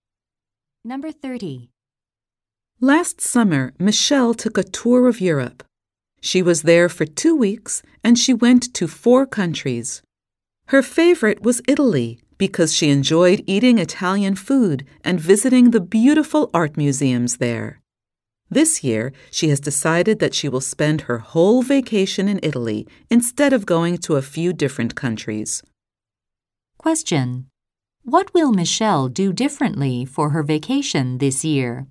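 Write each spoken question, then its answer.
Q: What will Michelle do differently for her vacation this year?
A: Spend her whole vacation in Italy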